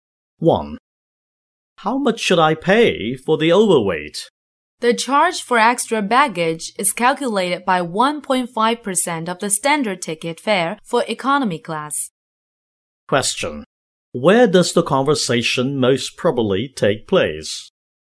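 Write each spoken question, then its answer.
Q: Where does the conversation most probably take place?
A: At an airport check-in counter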